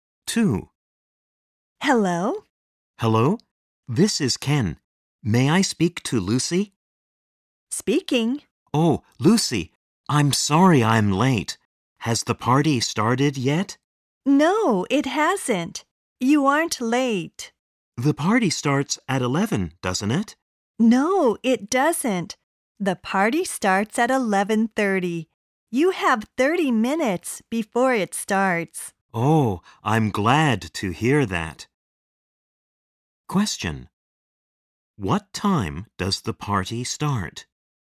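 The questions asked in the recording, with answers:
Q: What time does the party start?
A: At 11:30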